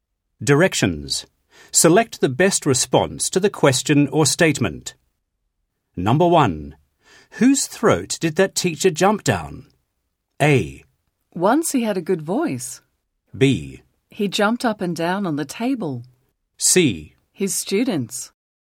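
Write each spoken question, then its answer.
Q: Whose throat did that teacher jump down?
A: C: His students.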